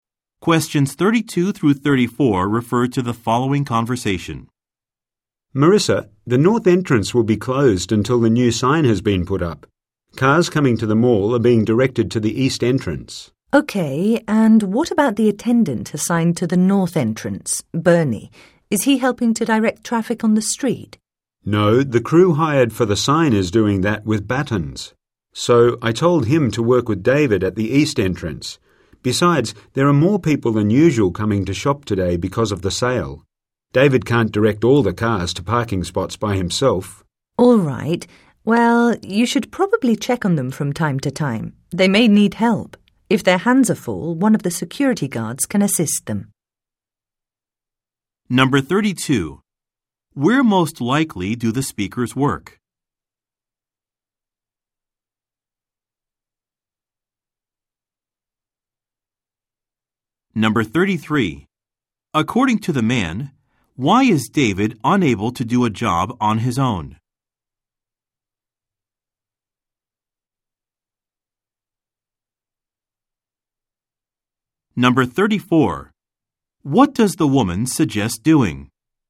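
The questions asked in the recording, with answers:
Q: Where most likely do the speakers work?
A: At a shopping mall

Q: According to the man, why is David unable to do a job on his own?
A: More shoppers than usual are coming because of the sale

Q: What does the woman suggest doing?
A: Checking on the attendants from time to time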